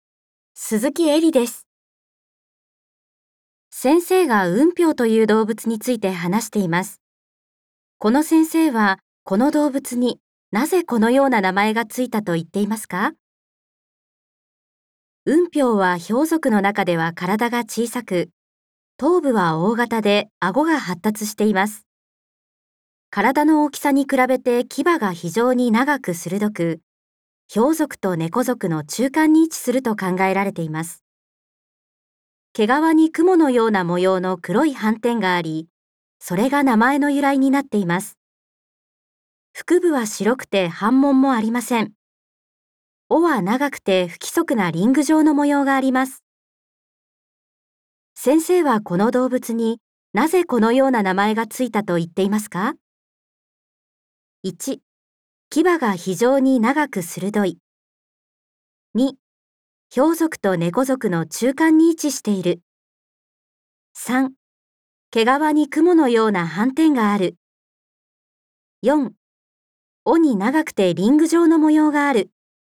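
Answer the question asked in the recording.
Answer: 3: 毛皮に雲のような斑点がある。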